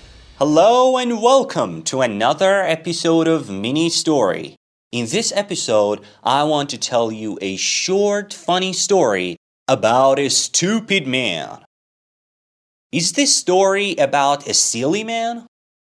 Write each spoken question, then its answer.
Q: Is this story about a silly man?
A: Yes, this story is about a silly man.